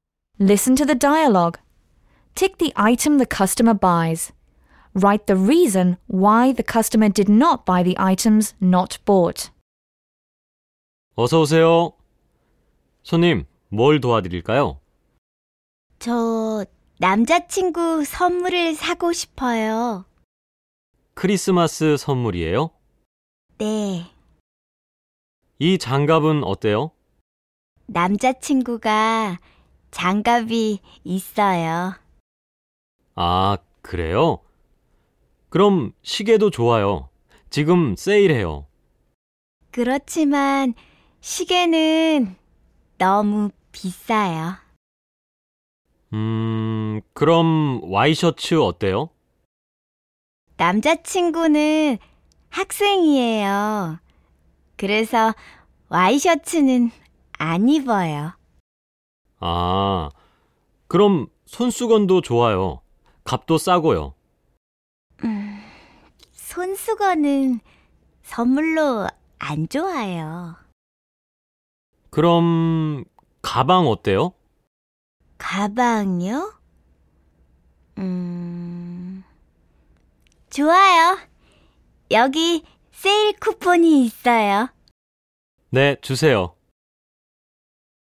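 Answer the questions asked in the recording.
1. A bag (가방)
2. Gloves: boyfriend already has gloves; watch: too expensive; dress shirt: boyfriend is a student and doesn't wear them; handkerchief: not a good gift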